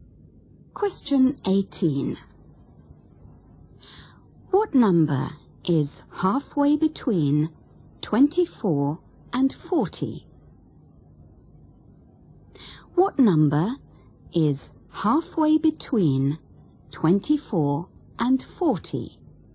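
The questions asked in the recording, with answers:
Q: What number is halfway between 24 and 40?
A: 32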